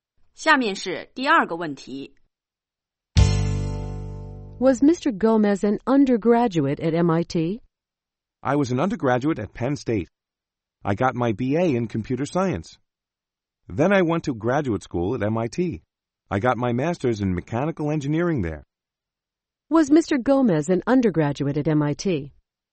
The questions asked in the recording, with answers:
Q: Was Mr. Gomez an undergraduate at MIT?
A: No, he wasn't. He went to graduate school at MIT.